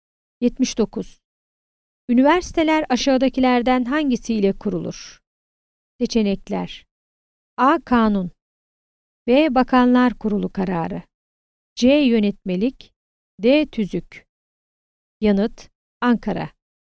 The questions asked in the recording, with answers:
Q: Üniversiteler aşağıdakilerden hangisiyle kurulur?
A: Yanıt: Ankara.